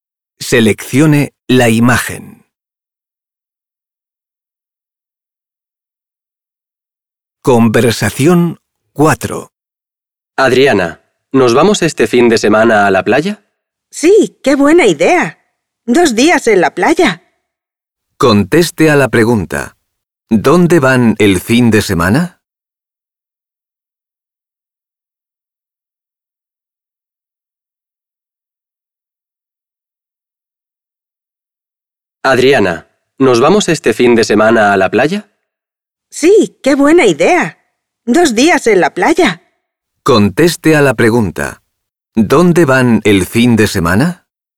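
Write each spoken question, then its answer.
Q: ¿Dónde van el fin de semana?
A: A la playa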